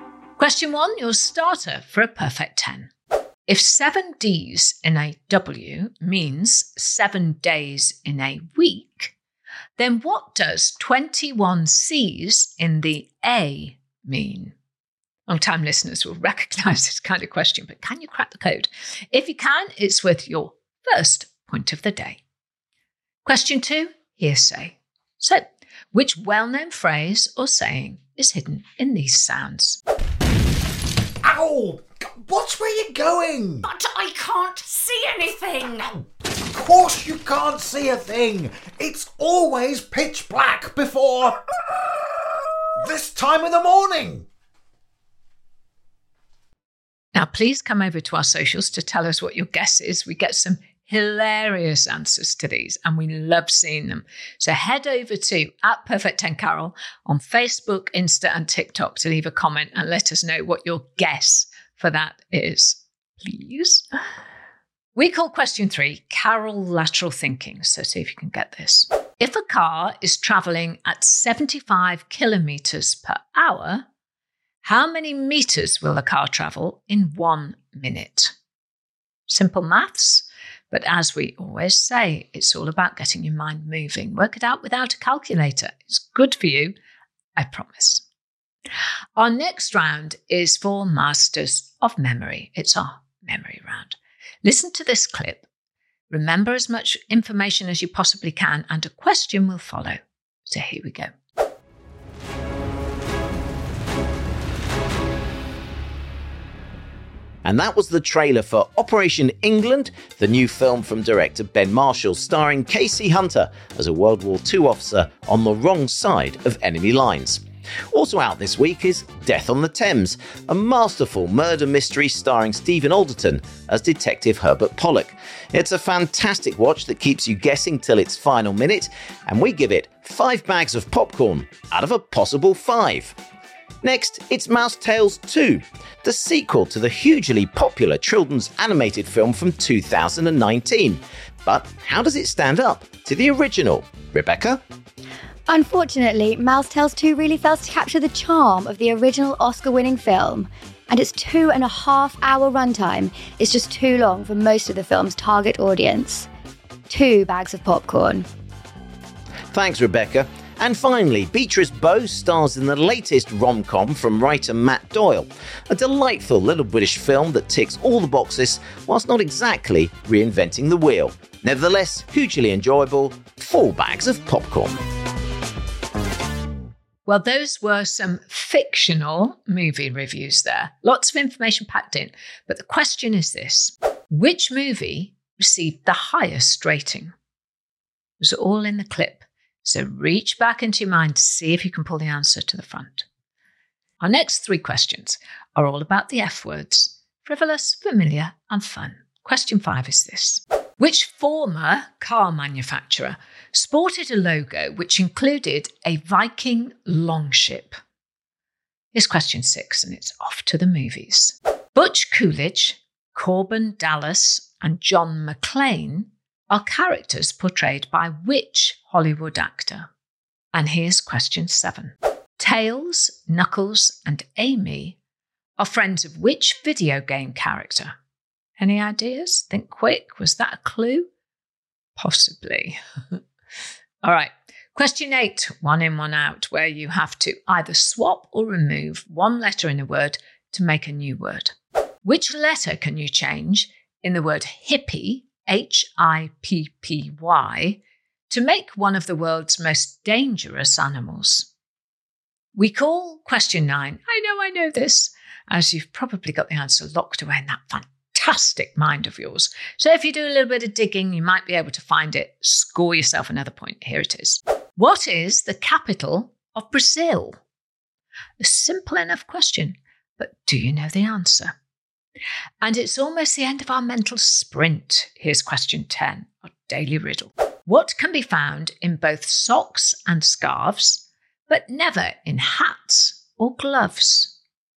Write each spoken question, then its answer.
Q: If a car is travelling at 75 kilometres per hour, how many metres will the car travel in 1 minute?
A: The answer is 1,250 metres.

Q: Which movie received the highest rating?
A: The answer was Death on the Thames.